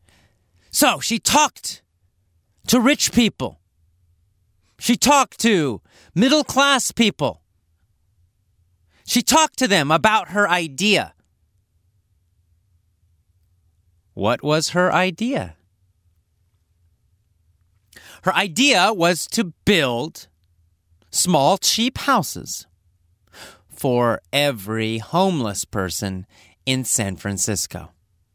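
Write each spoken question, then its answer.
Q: What was her idea?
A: To build small, cheap houses for every homeless person in San Francisco.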